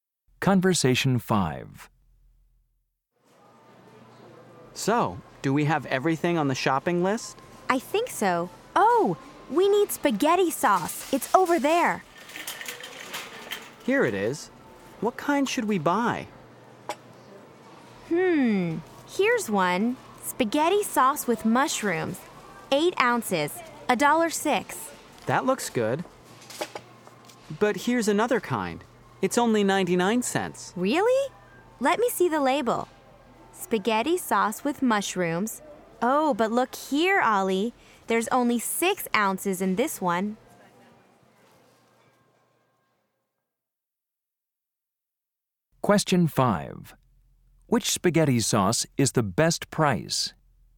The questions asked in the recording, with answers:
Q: Which spaghetti sauce is the best price?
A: The 8-ounce size for $1.06 is the best price.